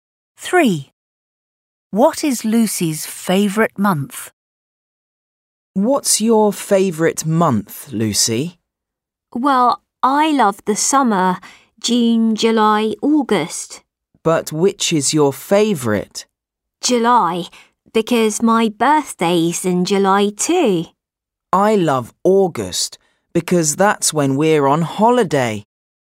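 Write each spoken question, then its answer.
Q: What is Lucy's favourite month?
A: July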